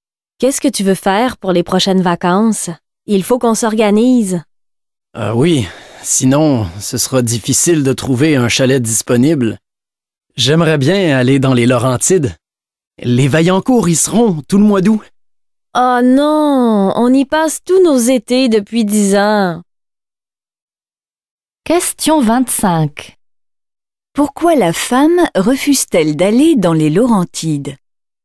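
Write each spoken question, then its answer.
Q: Pourquoi la femme refuse-t-elle d'aller dans les Laurentides?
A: Parce qu'ils y passent tous leurs étés depuis 10 ans.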